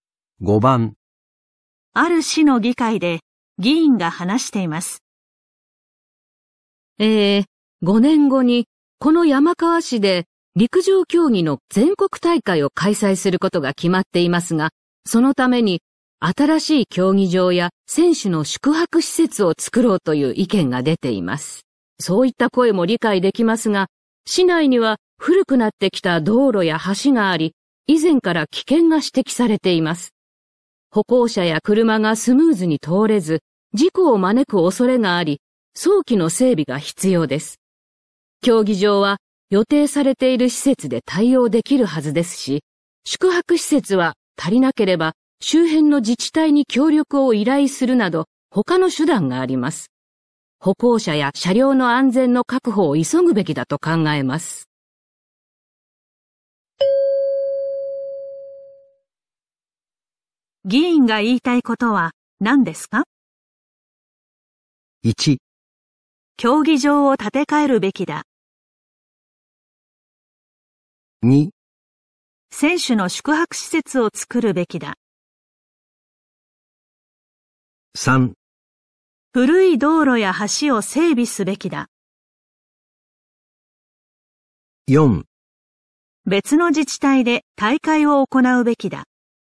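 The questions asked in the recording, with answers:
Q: 議員が言いたいことは何ですか?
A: 3: 古い道路や橋を整備すべきだ。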